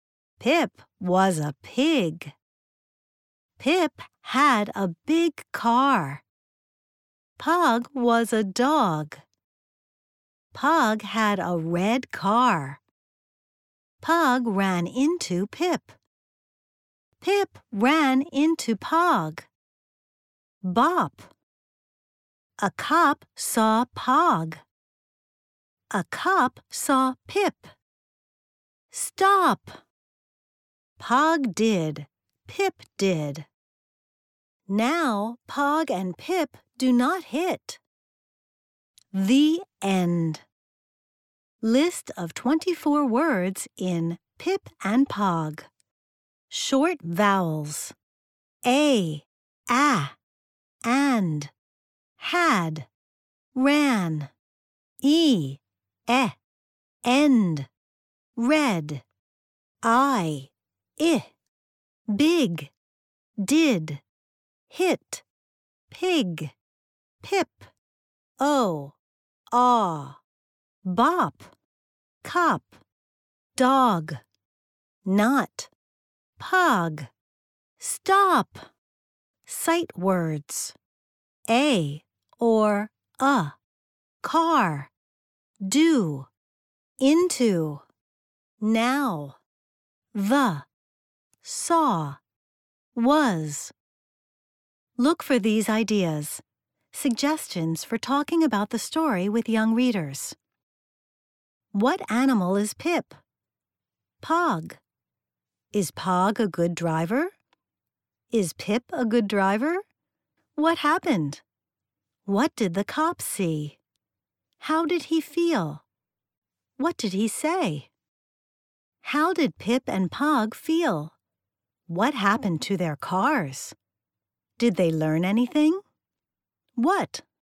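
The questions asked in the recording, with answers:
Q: What animal is Pip?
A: a pig

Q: What happened?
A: Pog and Pip ran into each other

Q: What did the cop see?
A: Pog and Pip

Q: What did he say?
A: Stop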